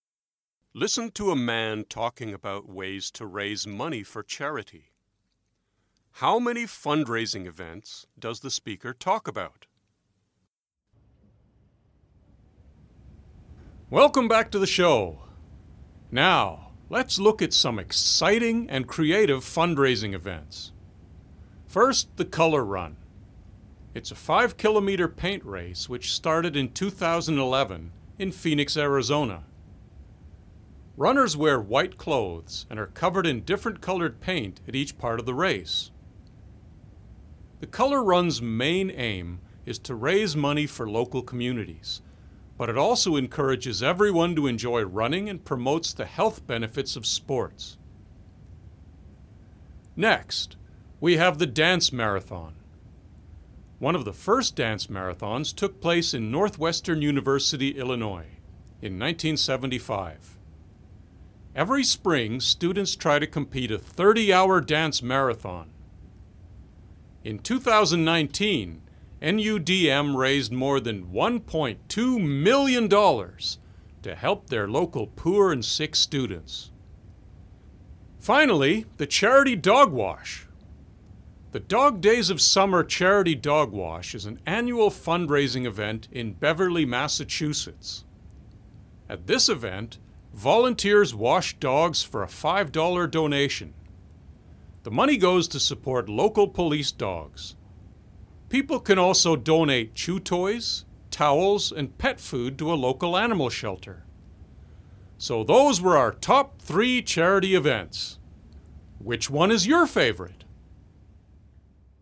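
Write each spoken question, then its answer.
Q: How many fundraising events does the speaker talk about?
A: Three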